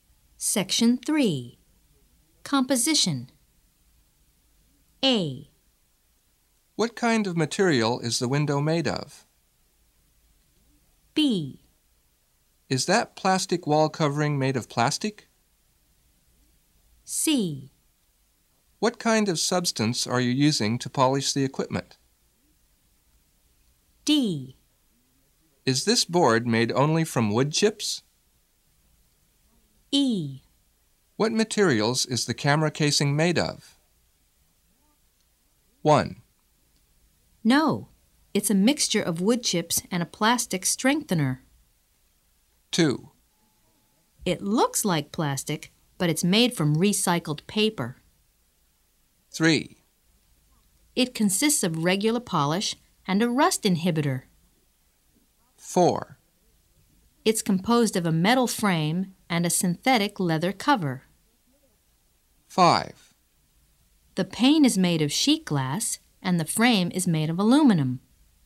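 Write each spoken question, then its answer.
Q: What kind of material is the window made of?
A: 5: The pane is made of sheet glass, and the frame is made of aluminum.

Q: Is that plastic wall covering made of plastic?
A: 2: It looks like plastic, but it's made from recycled paper.

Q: What kind of substance are you using to polish the equipment?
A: 3: It consists of regular polish and a rust inhibitor.

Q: Is this board made only from wood chips?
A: 1: No, it's a mixture of wood chips and a plastic strengthener.

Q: What materials is the camera casing made of?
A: 4: It's composed of a metal frame and a synthetic leather cover.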